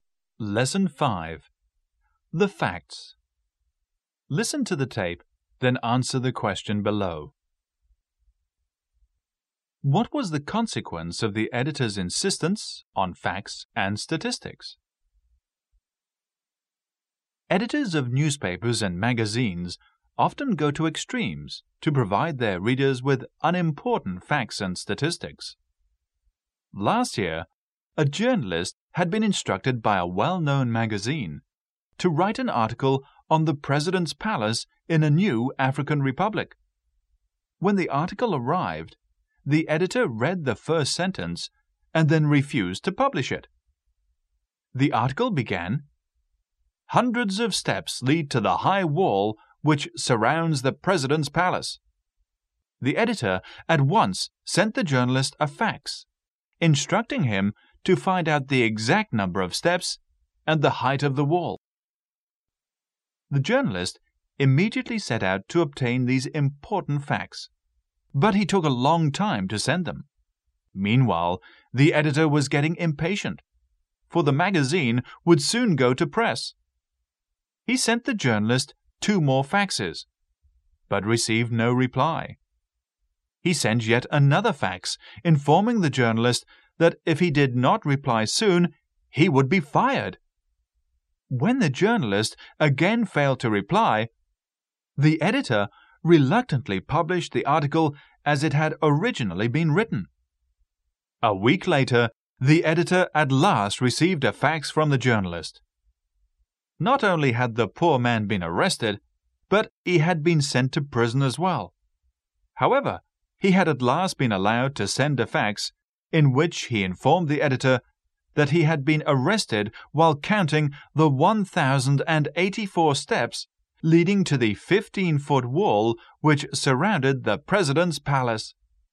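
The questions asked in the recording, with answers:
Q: What was the consequence of the editor's insistence on facts and statistics?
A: The journalist was arrested and sent to prison while counting the steps, and the article was published as originally written.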